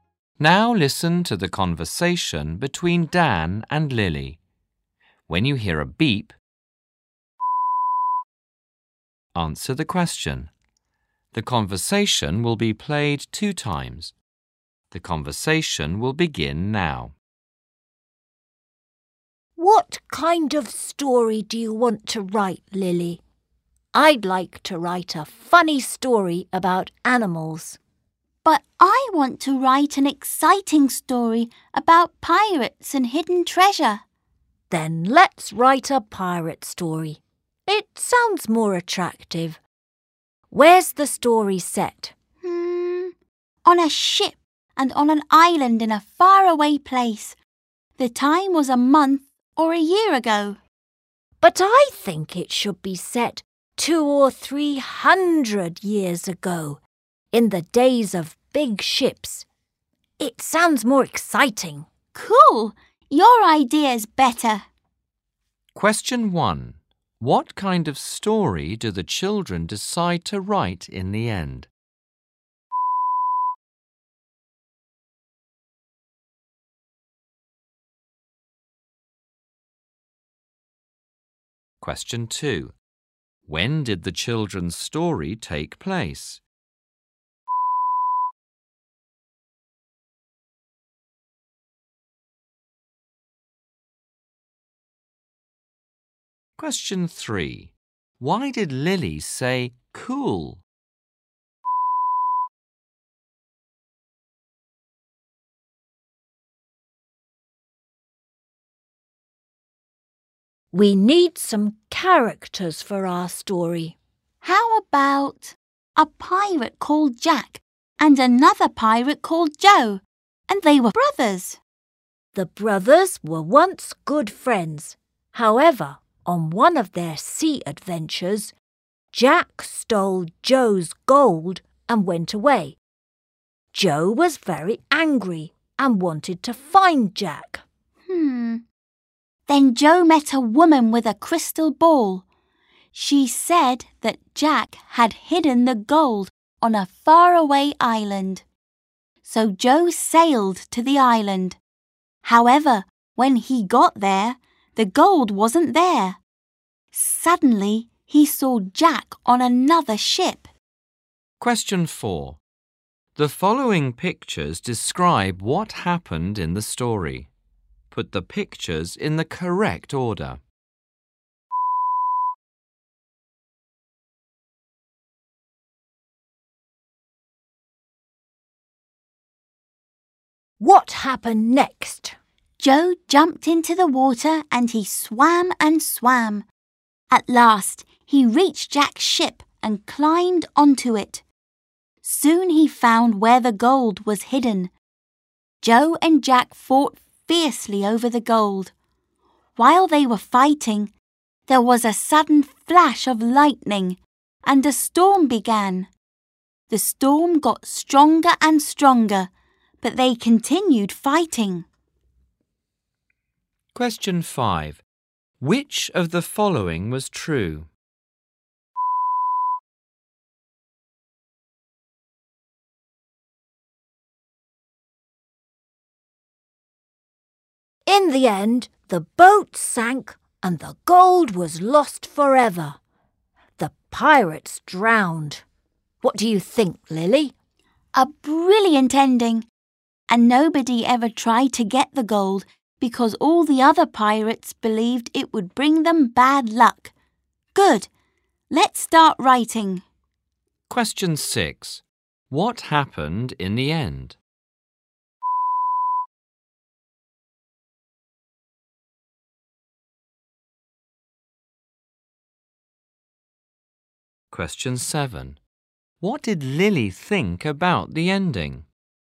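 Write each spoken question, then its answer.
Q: What kind of story do the children decide to write in the end?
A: A pirate story

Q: When did the children's story take place?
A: 200 or 300 years ago

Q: Why did Lily say cool?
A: She thought Dan's idea was better

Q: What happened in the end?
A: The boat sank, the gold was lost forever and the pirates drowned

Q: What did Lily think about the ending?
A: It was brilliant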